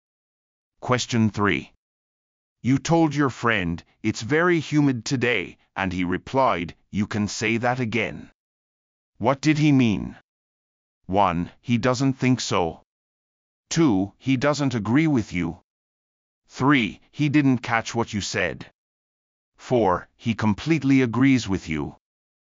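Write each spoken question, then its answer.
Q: What did he mean?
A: 4: He completely agrees with you.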